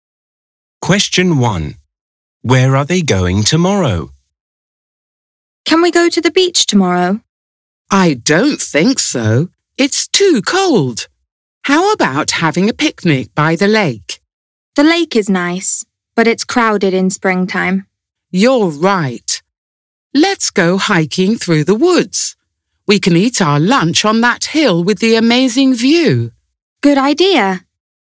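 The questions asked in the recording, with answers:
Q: Where are they going tomorrow?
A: hiking through the woods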